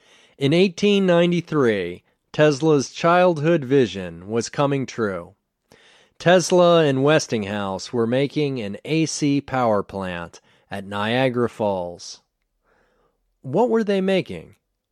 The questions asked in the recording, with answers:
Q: What were they making?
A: They were making an AC power plant at Niagara Falls.